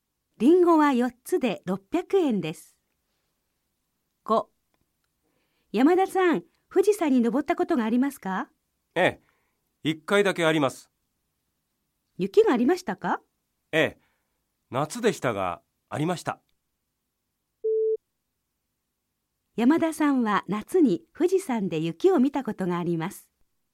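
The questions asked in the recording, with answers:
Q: 山田さんは夏に富士山で雪を見たことがあります。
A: はい、正しい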